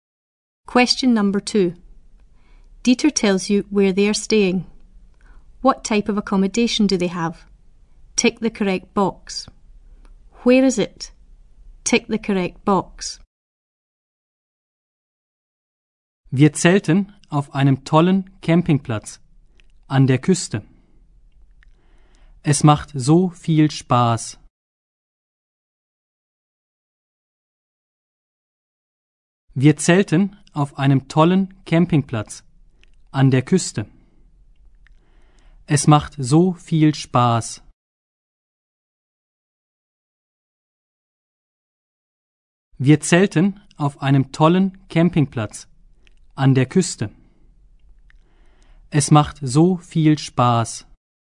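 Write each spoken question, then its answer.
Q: What type of accommodation do they have?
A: A campsite (camping)

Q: Where is it?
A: On the coast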